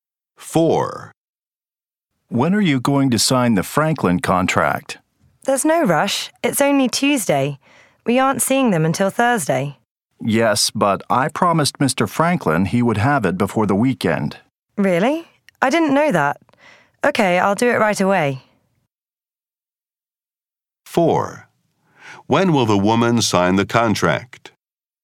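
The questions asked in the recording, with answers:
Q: When will the woman sign the contract?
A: Right away (Tuesday)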